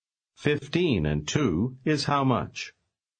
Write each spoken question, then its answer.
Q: 15 and 2 is how much?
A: 17.